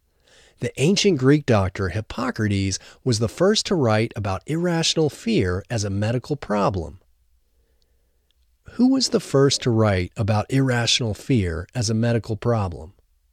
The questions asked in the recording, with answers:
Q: Who was the first to write about irrational fear as a medical problem?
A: The ancient Greek doctor Hippocrates was the first to write about irrational fear as a medical problem.